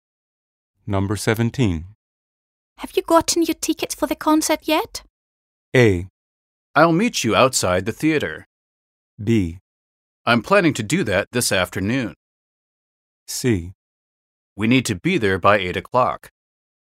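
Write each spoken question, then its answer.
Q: Have you gotten your tickets for the concert yet?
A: B: I'm planning to do that this afternoon.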